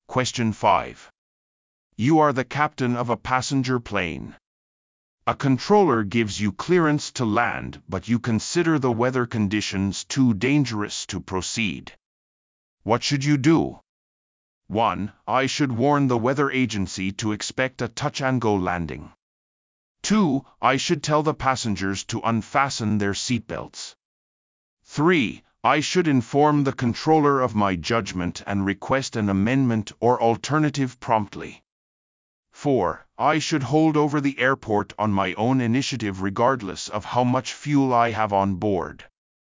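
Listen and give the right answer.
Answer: 3: I should inform the controller of my judgment and request an amendment or alternative promptly.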